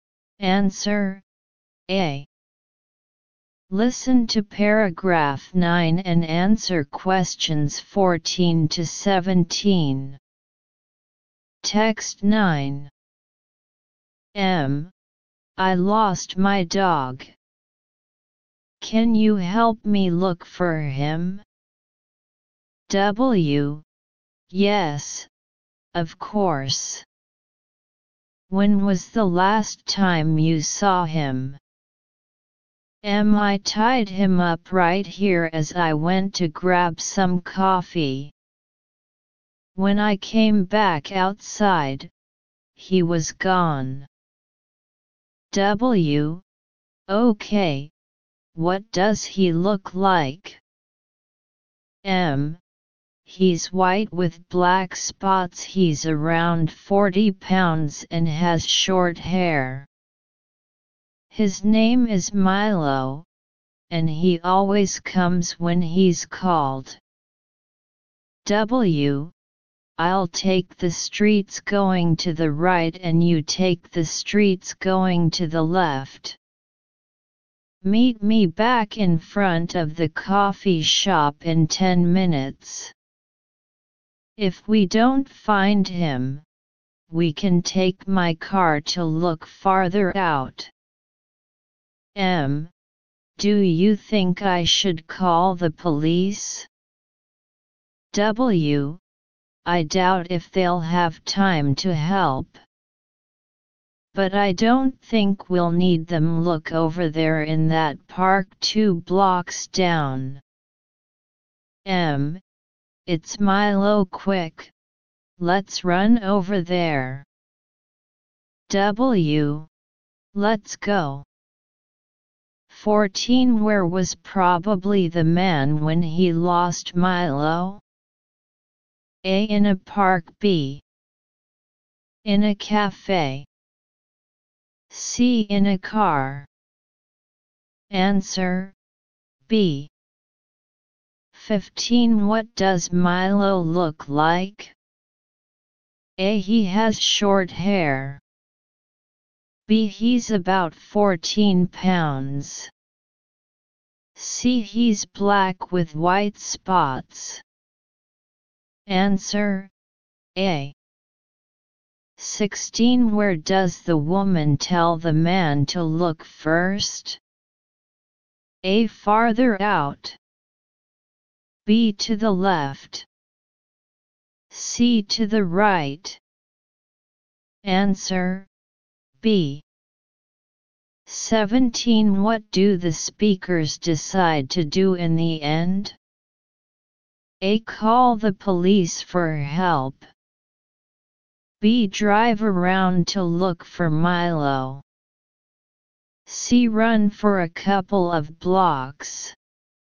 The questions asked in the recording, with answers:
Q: Where was probably the man when he lost Milo?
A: Answer, B.

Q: What does Milo look like?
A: Answer, A.

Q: Where does the woman tell the man to look first?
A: Answer, B.

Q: What do the speakers decide to do in the end?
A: Answer, C.